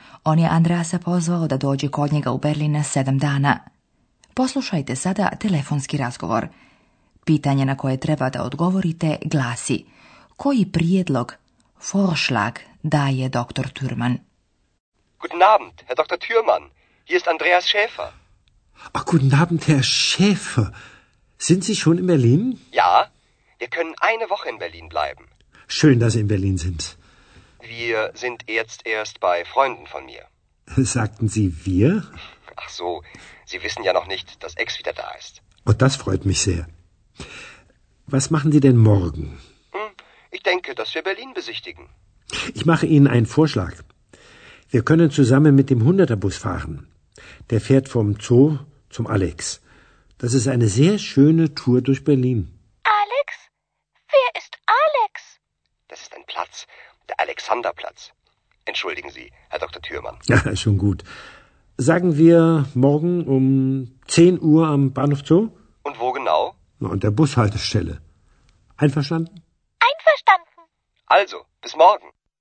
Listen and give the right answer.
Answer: Doktor Türman predlaže vožnju autobusom i razgledanje znamenitosti grada Berlina.